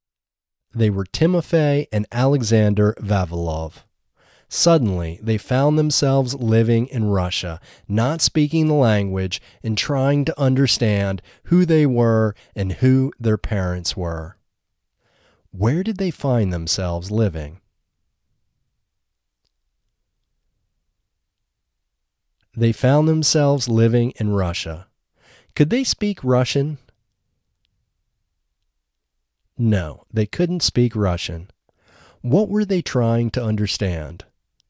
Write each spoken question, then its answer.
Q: Where did they find themselves living?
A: They found themselves living in Russia.

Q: What were they trying to understand?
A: They were trying to understand who they were and who their parents were.